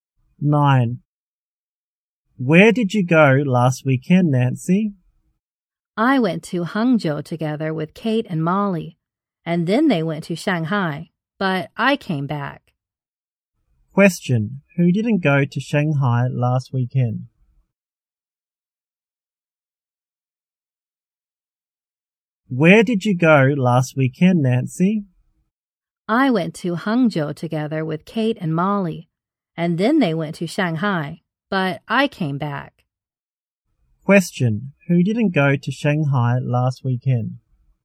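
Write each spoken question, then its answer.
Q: Who didn't go to Shanghai last weekend?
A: Nancy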